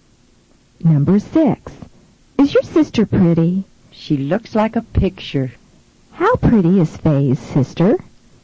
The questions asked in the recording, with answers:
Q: How pretty is Faye's sister?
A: She's as pretty as a picture.